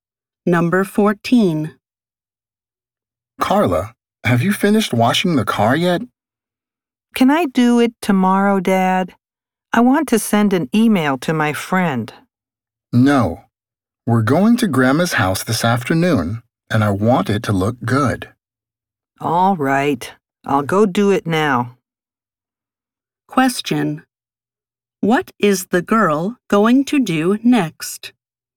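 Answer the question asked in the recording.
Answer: Wash the car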